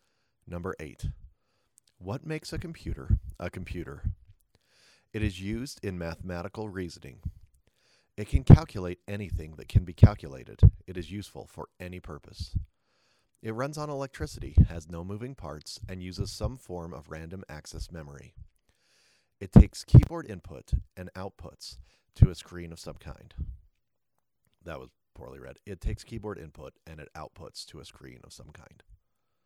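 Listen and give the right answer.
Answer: B: It can calculate anything that can be calculated.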